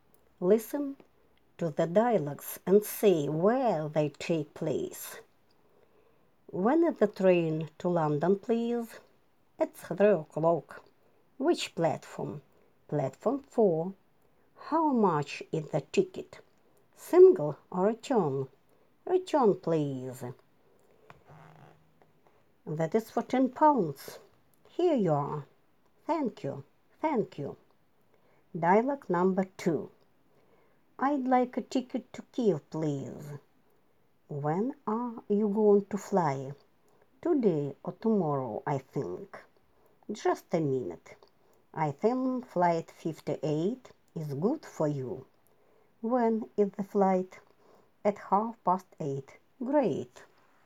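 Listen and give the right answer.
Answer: Dialogue 1: at a railway station (train ticket office); Dialogue 2: at an airport / air ticket office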